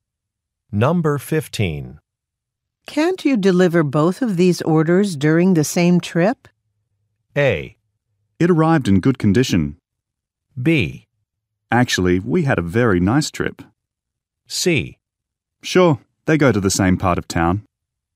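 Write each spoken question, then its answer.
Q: Can't you deliver both of these orders during the same trip?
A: C: Sure, they go to the same part of town.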